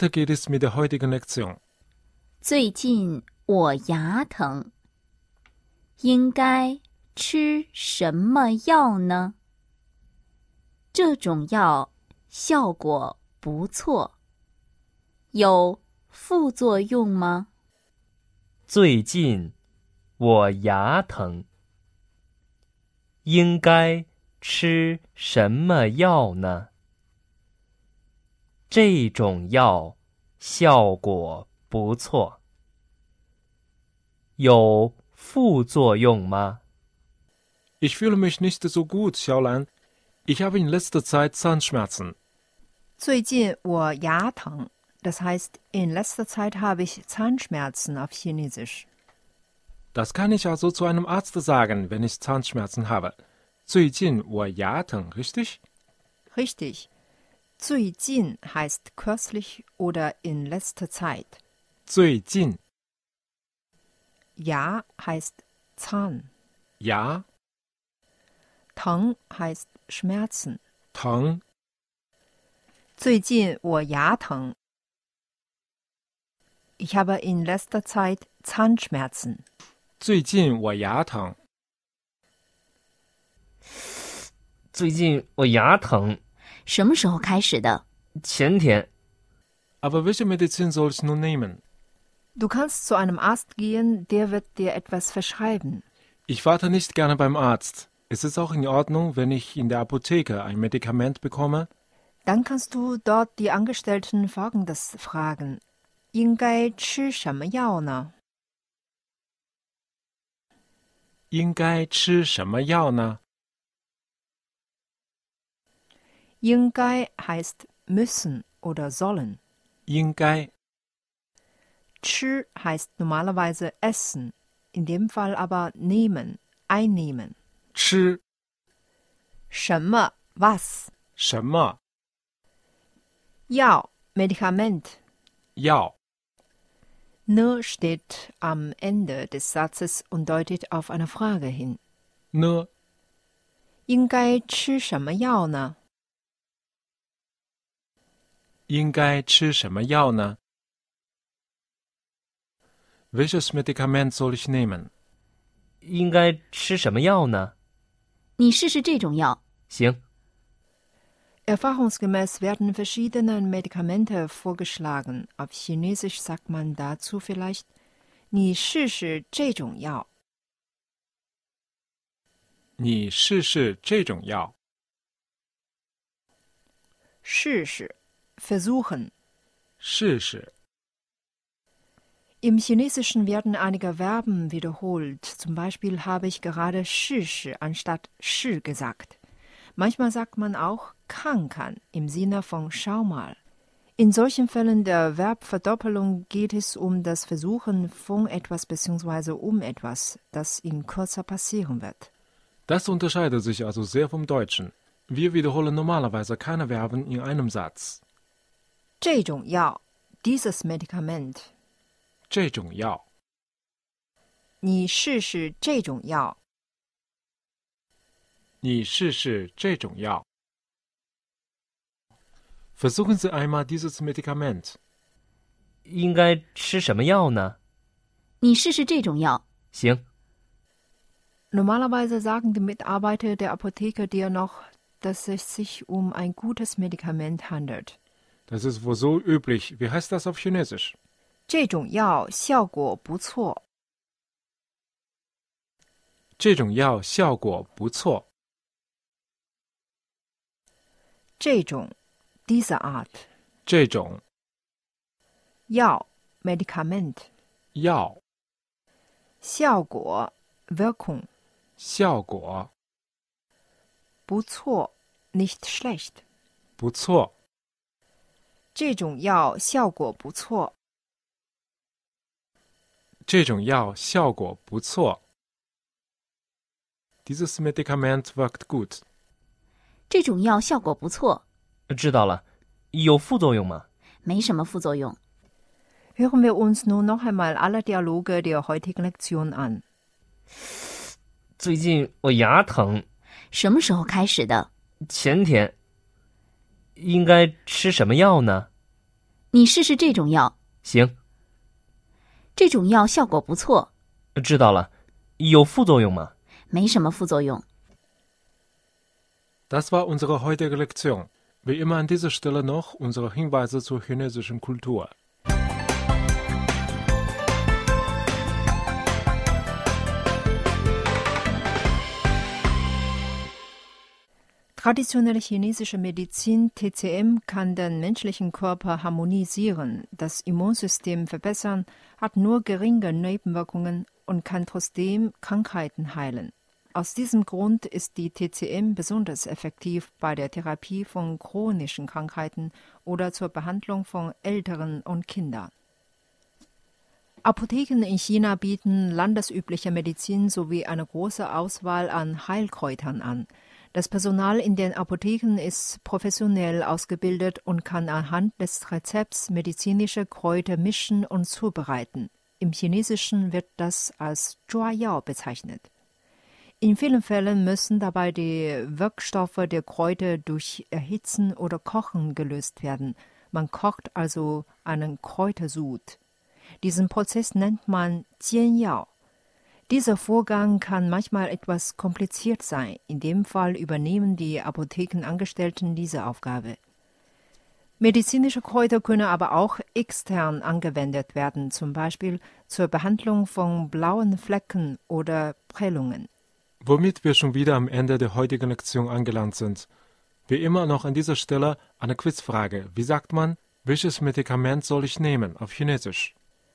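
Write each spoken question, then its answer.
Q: Wie sagt man, welches Medikament soll ich nehmen auf Chinesisch?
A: 应该吃什么药呢?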